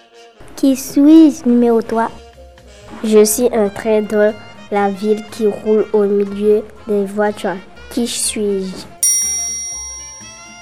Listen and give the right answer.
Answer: Un tramway.